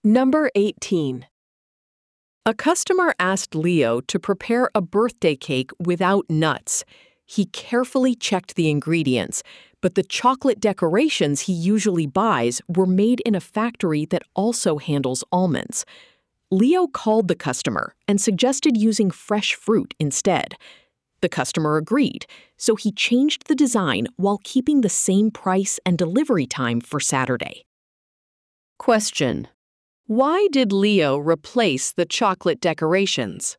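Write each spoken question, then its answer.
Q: why did Leo replace the chocolate decorations?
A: They were made in a factory that also handles almonds, and the cake had to be nut-free.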